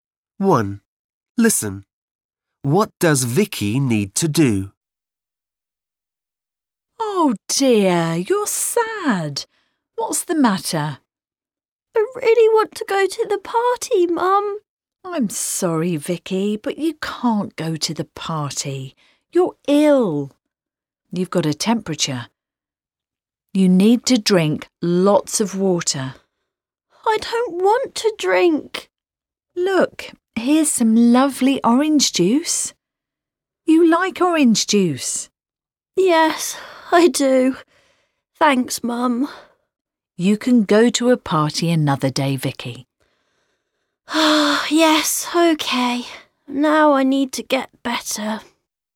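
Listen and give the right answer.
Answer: Drink lots of water (and get better)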